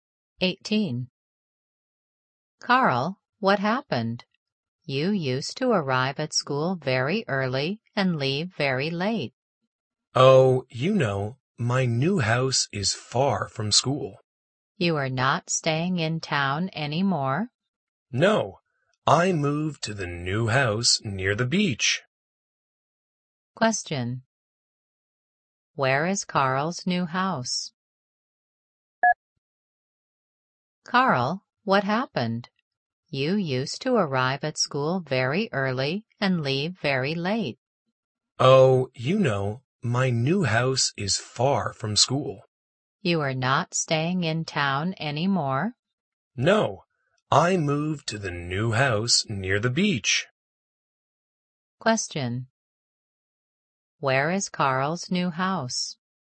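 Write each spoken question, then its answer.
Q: Where is Carl's new house?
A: Near the beach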